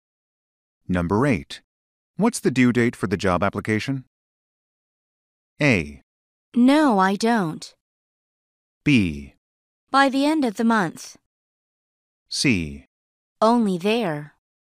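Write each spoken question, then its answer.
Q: What's the due date for the job application?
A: B: By the end of the month.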